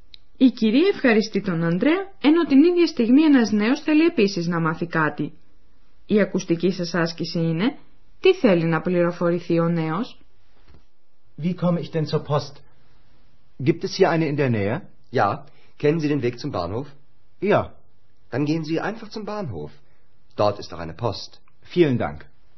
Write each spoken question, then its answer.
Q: Η ακουστική σας άσκηση είναι «Τι θέλει να πληροφορηθεί ο νέος»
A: Ο νέο άνδρα θέλει να μάθει αν υπάρχει κάποιο ταχυδρομικό γραφείο κοντά στο ξενοδοχείο Ευρώπη.